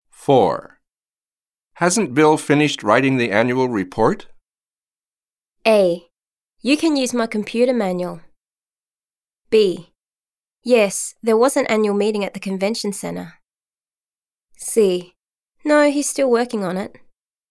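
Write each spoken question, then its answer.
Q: Hasn't Bill finished writing the annual report?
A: C: No, he's still working on it.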